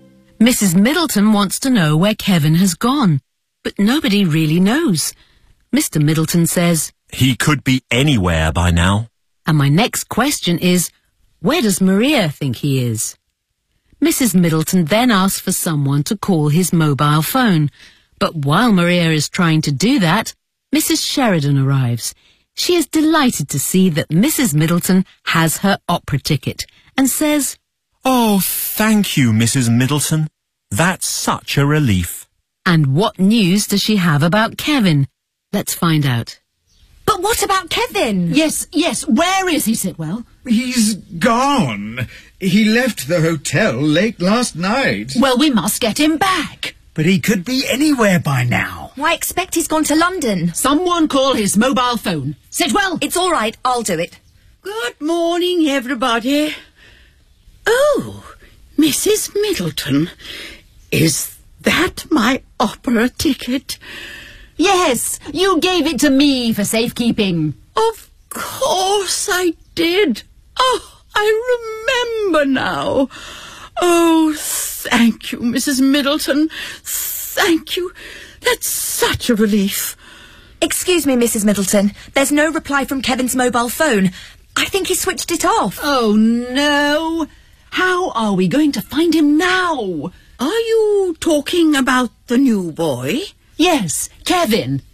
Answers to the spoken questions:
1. I expect he's gone to London.
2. I saw him just now.